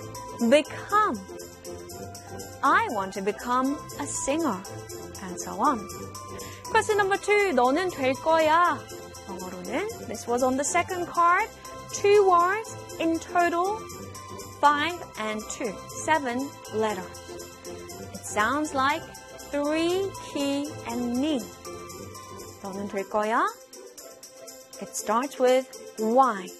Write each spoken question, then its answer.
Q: 너는 될 거야. 영어로는 this was on the second card.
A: It is, of course, you'll be.